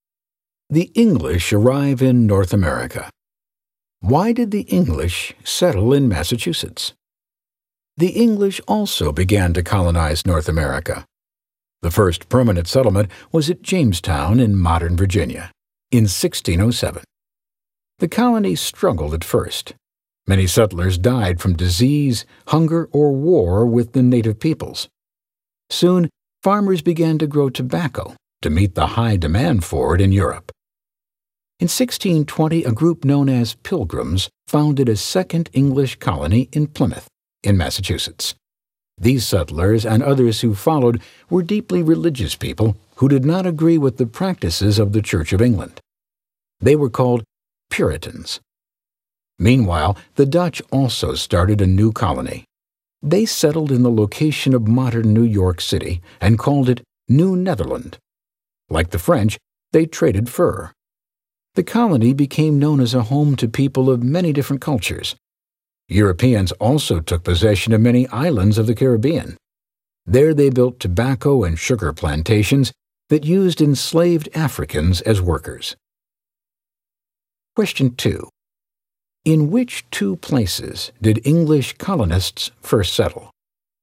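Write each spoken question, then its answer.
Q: In which two places did English colonists first settle?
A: Jamestown, Virginia and Plymouth, Massachusetts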